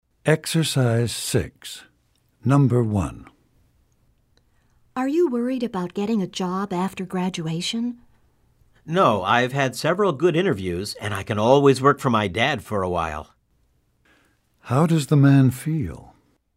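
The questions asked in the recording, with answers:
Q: How does the man feel?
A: Not worried; confident he will find work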